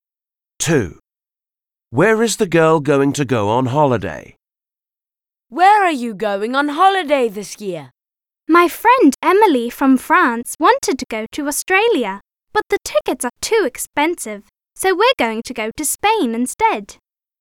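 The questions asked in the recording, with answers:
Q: Where is the girl going to go on holiday?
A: Spain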